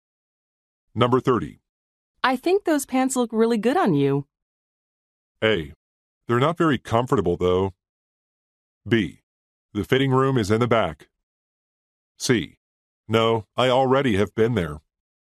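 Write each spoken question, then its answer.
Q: I think those pants look really good on you.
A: A: They're not very comfortable, though.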